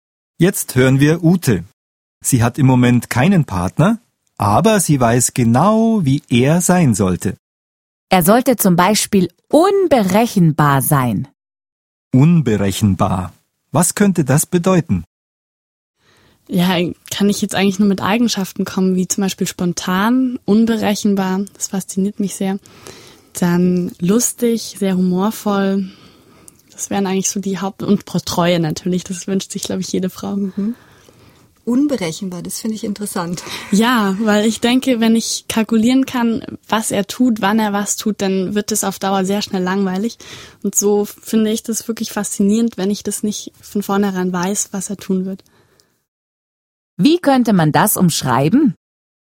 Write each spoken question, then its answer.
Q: Wie könnte man das umschreiben?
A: Man weiß vorher nicht, was er tun wird.